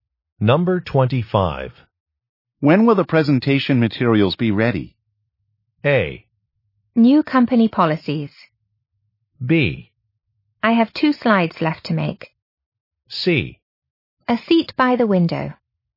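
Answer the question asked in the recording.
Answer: B: I have 2 slides left to make.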